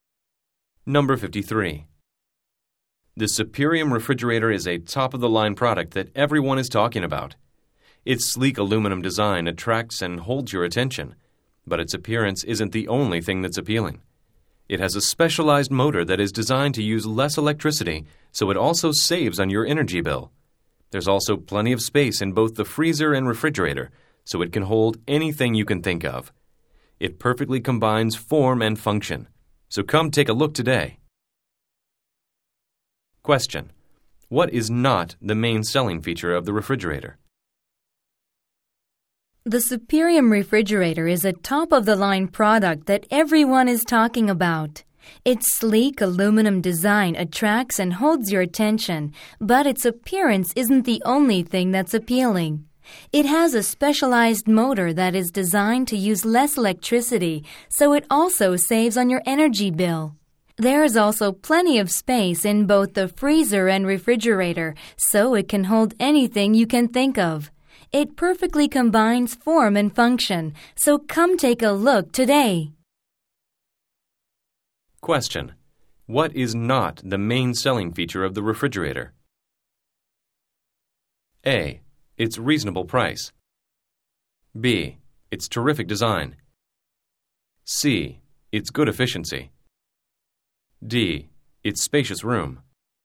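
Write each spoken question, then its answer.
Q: What is not the main selling feature of the refrigerator?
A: A: Its reasonable price.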